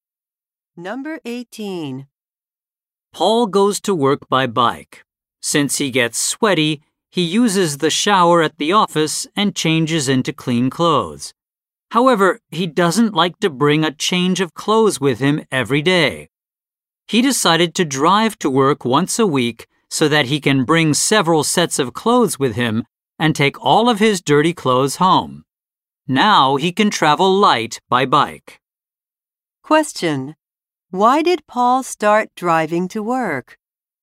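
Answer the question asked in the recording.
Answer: To bring several sets of clothes and take dirty clothes home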